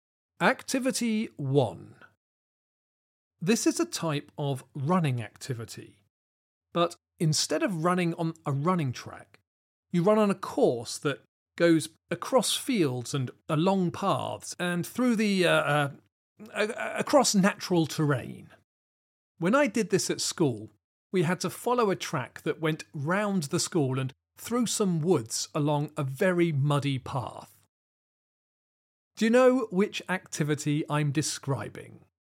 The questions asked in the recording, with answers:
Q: Do you know which activity I'm describing?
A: The answer is cross country.